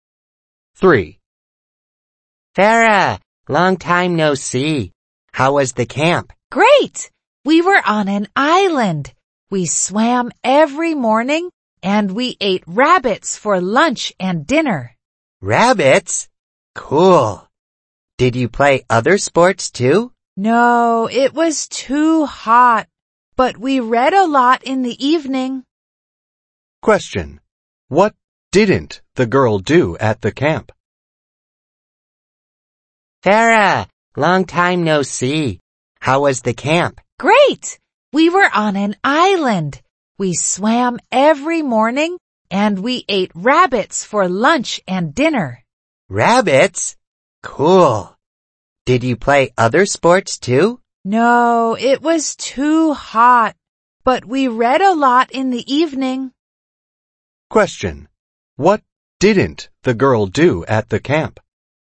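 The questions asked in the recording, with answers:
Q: What didn't the girl do at the camp?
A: Play other sports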